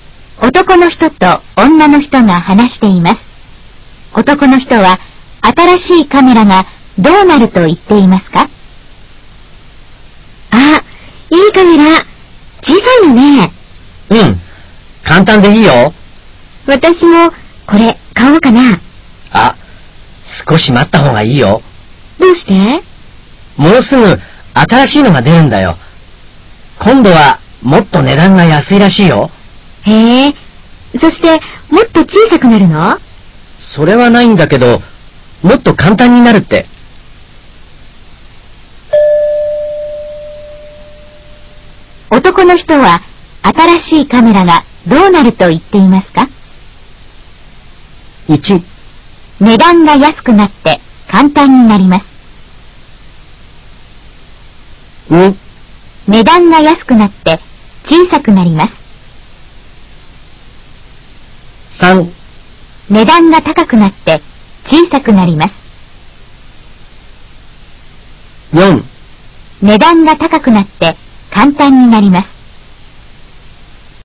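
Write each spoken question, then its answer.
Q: 男の人は新しいカメラがどうなると言っていますか?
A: 1: 値段が安くなって簡単になります。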